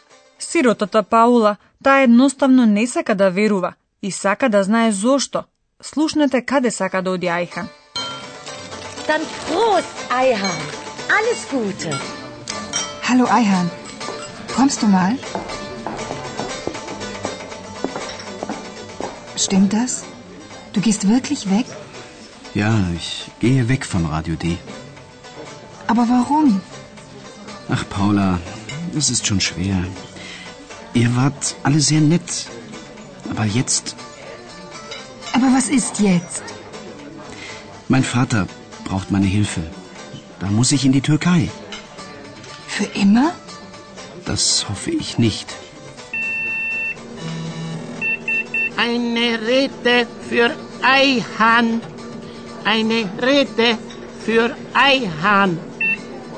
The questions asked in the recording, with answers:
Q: Слушнете каде сака да оди Айхан.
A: Сигурно слушнавте дека Айхан мора да се врати кај татко му во Турција.